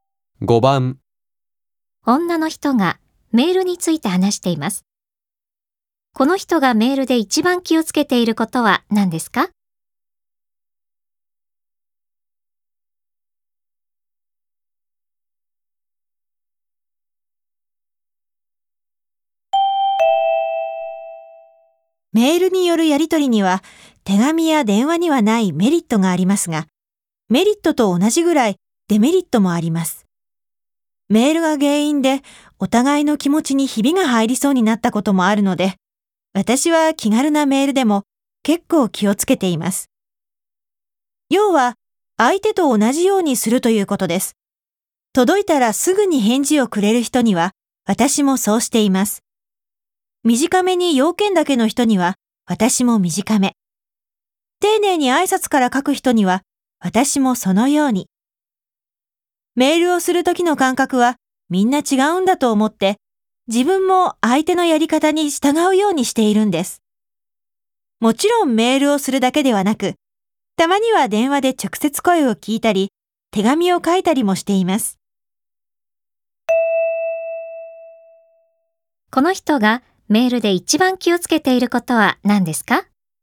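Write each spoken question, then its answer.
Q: この人がメールで一番気をつけていることは何ですか?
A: 相手のやり方に合わせること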